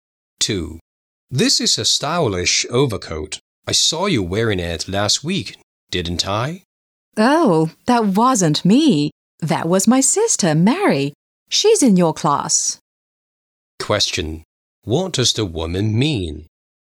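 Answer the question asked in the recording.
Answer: It was her sister Mary, not her, who wore the overcoat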